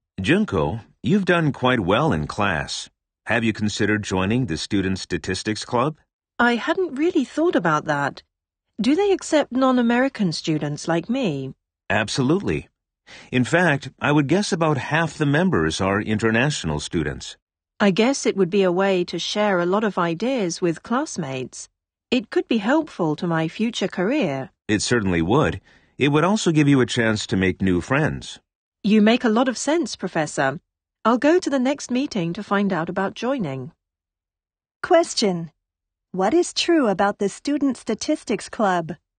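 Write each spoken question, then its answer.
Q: What is true about the Student Statistics Club?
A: About half its members are international students.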